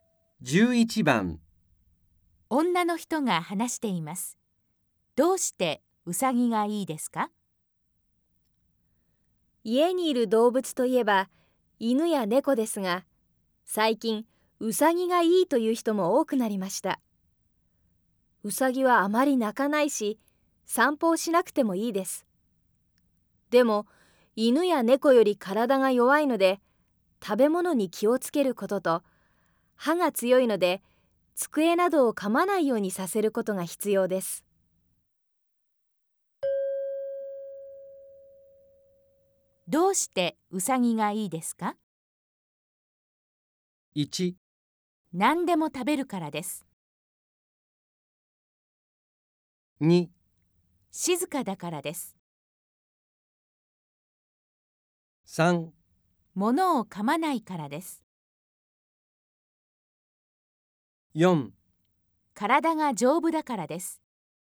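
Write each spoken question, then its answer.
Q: どうしてウサギがいいですか?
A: 2: 静かだからです。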